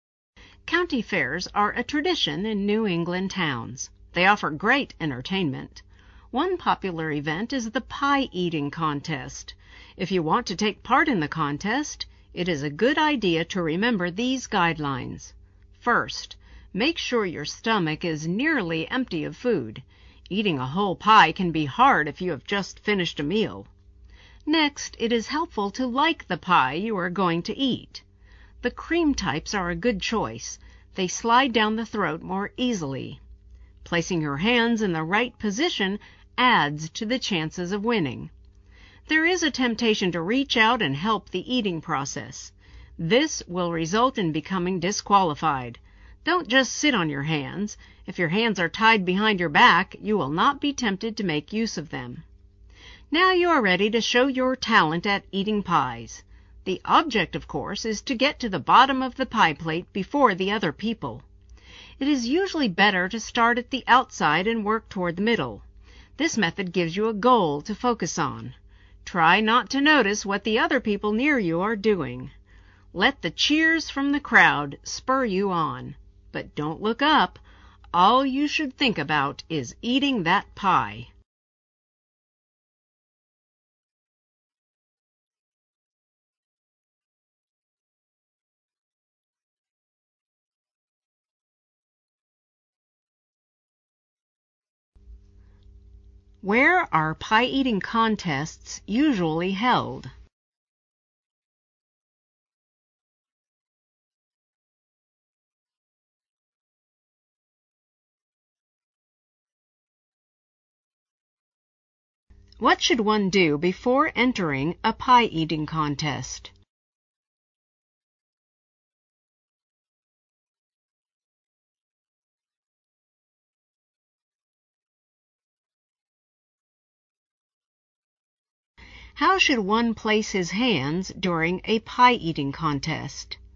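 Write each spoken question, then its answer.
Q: Where are pie-eating contests usually held?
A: At county fairs in New England towns

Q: What should one do before entering a pie-eating contest?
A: Make sure the stomach is nearly empty of food

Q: How should one place his hands during a pie-eating contest?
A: Tied behind the back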